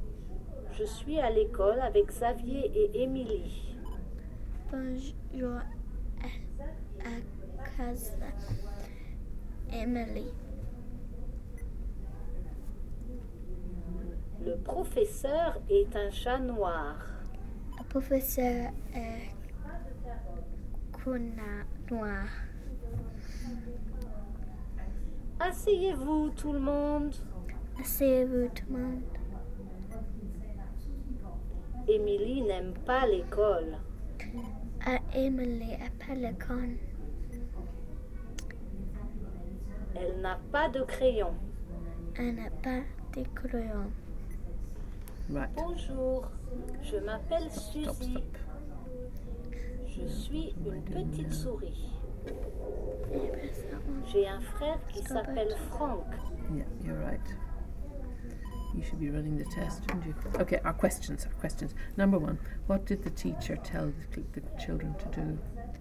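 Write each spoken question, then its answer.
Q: what did the teacher tell the children to do?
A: Sit down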